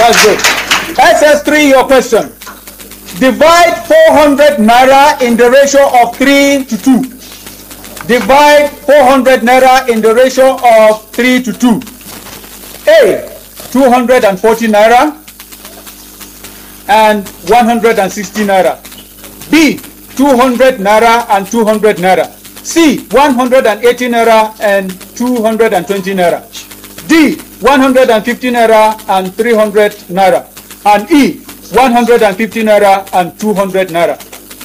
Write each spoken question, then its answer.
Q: Divide 400 naira in the ratio of 3 to 2.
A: Yes, 240 to 160 naira.